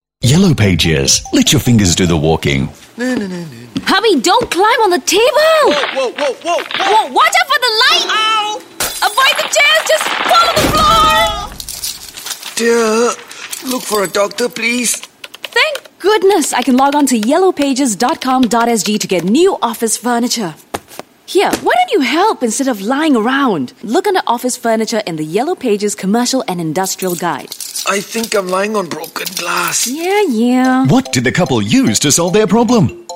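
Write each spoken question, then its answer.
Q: What did the couple use to solve their problem?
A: The Yellow Pages (yellowpages.com.sg / Commercial and Industrial Guide)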